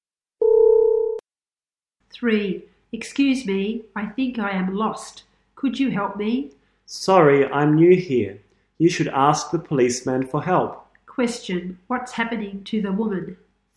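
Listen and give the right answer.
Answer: She is lost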